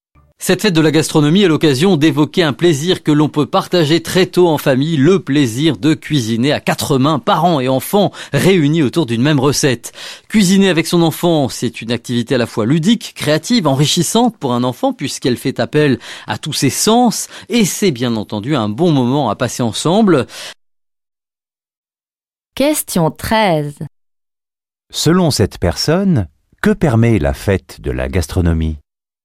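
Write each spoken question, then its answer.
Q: Selon cette personne, que permet la fête de la gastronomie ?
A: D'évoquer le plaisir de cuisiner en famille, parents et enfants ensemble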